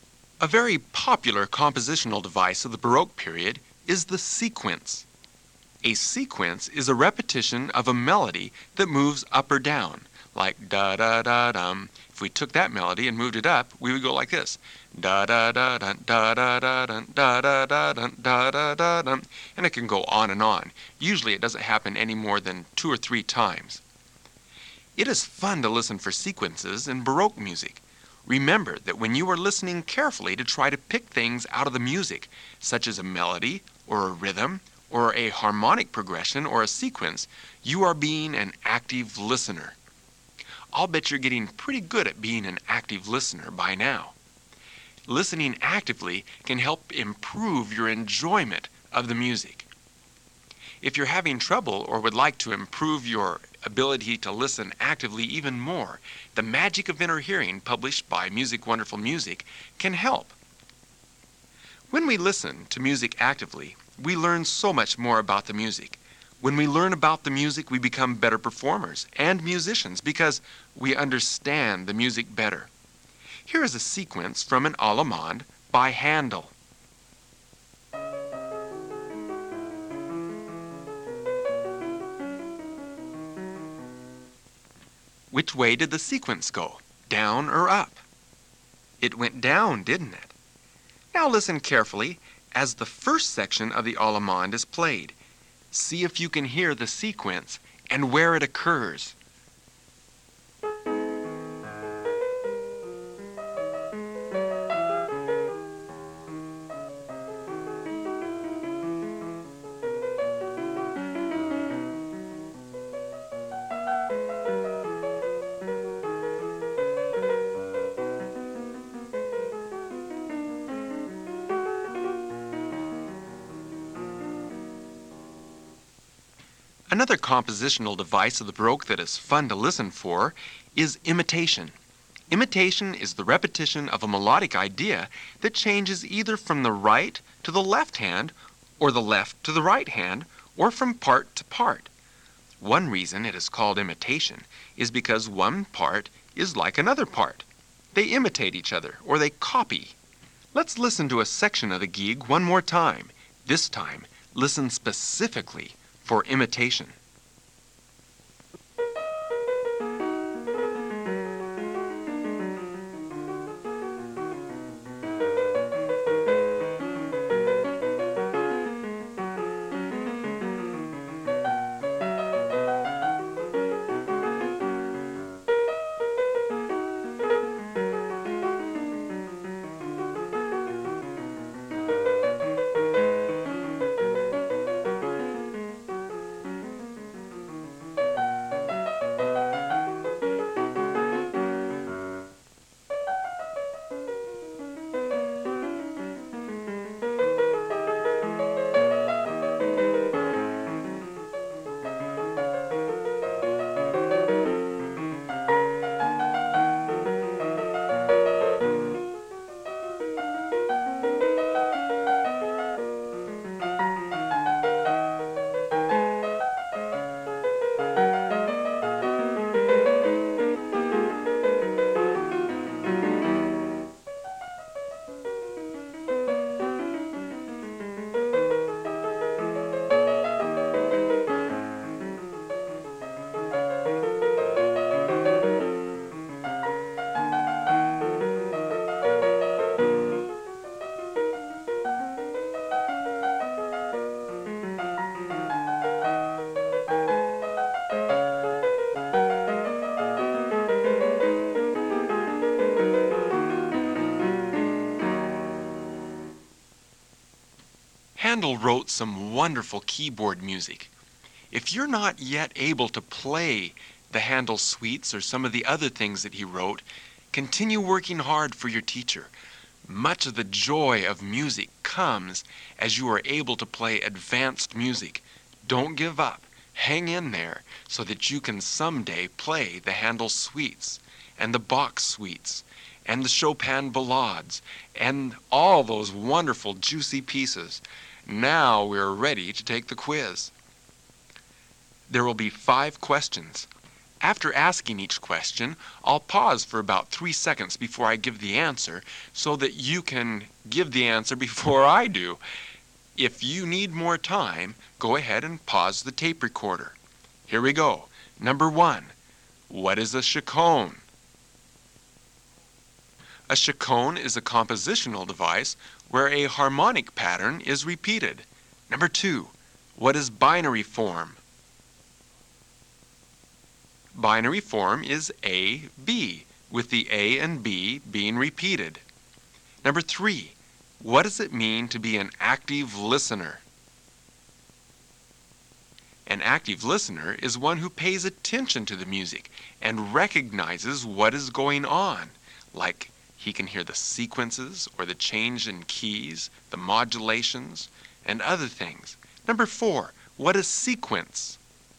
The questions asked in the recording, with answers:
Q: Number 4, what is sequence?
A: Sequence is a repeated melodic pattern that goes up or down on its repetition.